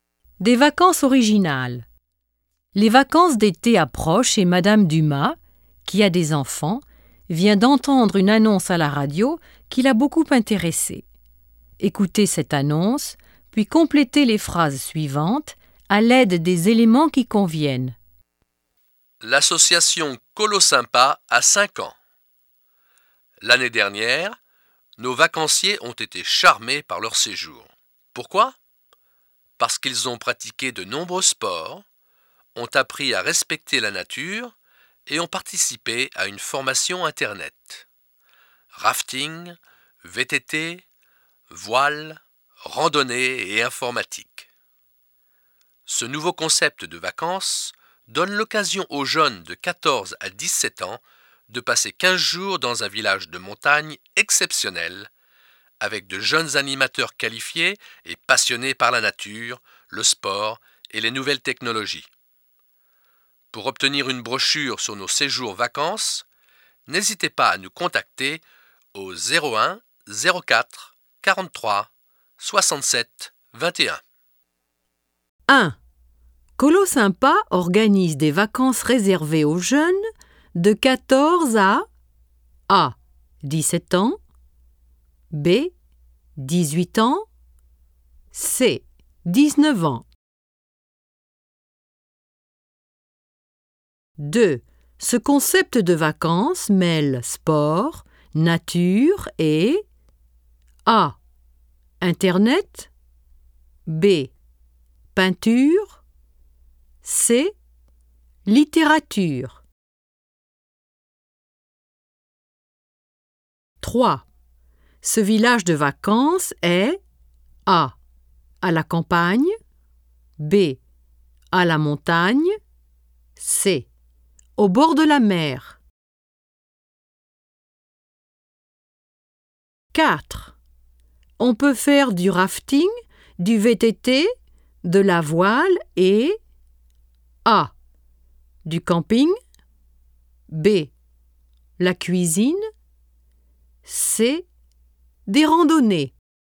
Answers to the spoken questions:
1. 1. A.
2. 2. A.
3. 3. B.
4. 4. C.